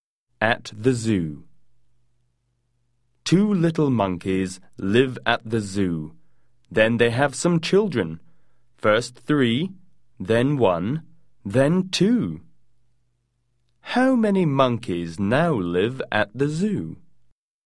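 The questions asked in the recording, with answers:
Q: How many monkeys now live at the zoo?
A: Eight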